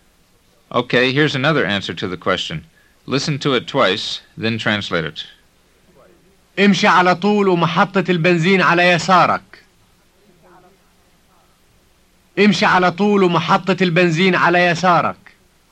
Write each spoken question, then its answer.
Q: Listen to it twice, then translate it.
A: It means go straight ahead and the gas station is on your left.